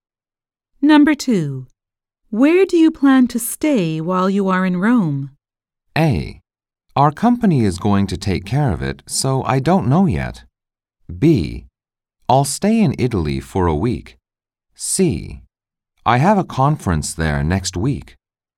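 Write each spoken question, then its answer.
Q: Where do you plan to stay while you are in Rome?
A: A: Our company is going to take care of it, so I don't know yet.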